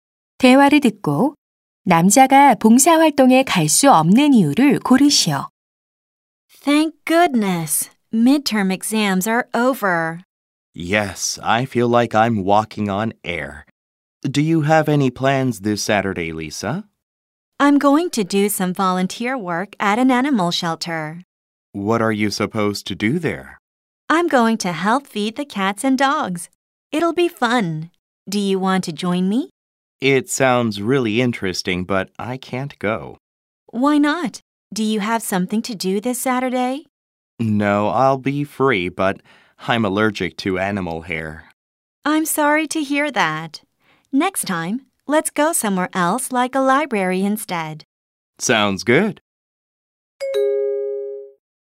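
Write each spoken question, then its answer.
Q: 6번 대화를 듣고 남자가 봉사활동에 갈 수 없는 이유를 고르시오.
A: 동물 털 알레르기가 있어서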